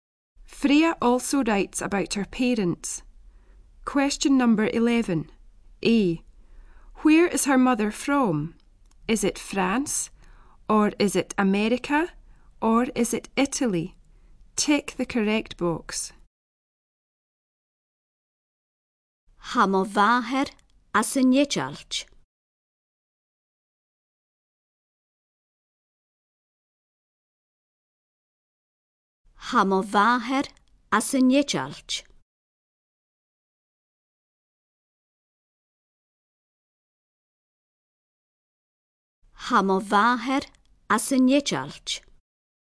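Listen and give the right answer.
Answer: C: Italy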